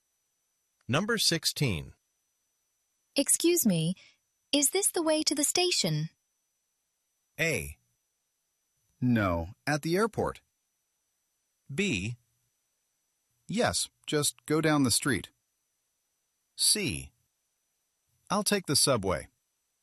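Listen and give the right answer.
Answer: B: Yes, just go down the street.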